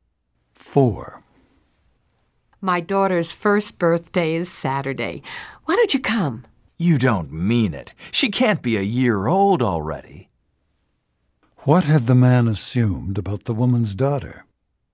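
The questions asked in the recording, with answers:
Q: What had the man assumed about the woman's daughter?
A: That she was younger than one year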